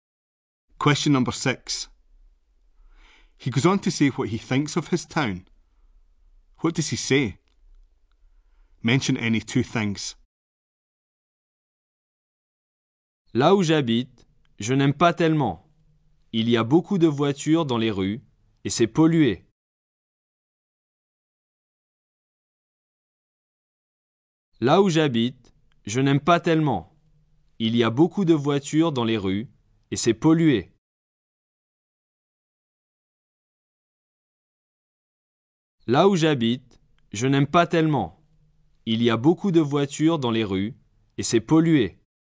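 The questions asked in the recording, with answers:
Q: What does he say? Mention any two things.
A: He doesn't like it much; there are lots of cars in the streets; it's polluted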